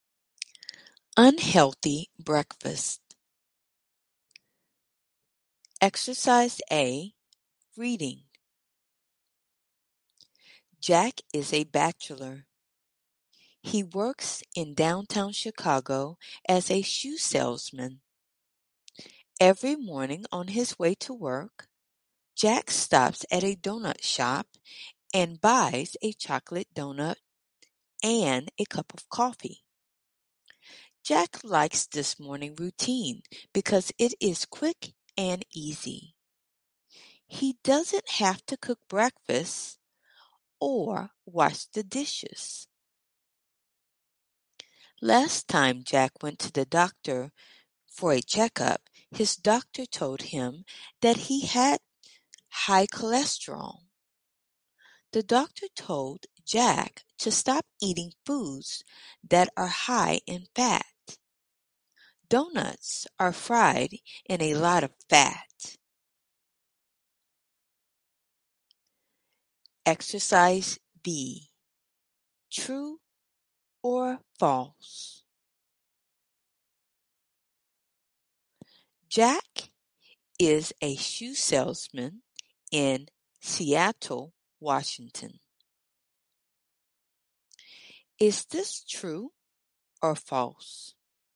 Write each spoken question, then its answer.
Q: Jack is a shoe salesman in Seattle, Washington. Is this true or false?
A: It's false.